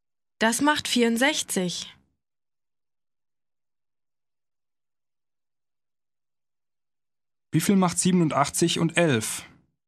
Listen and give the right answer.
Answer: Das macht 98.